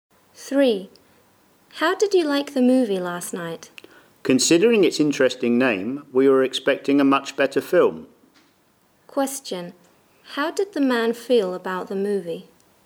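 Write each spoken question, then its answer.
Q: How did the man feel about the movie?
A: Disappointed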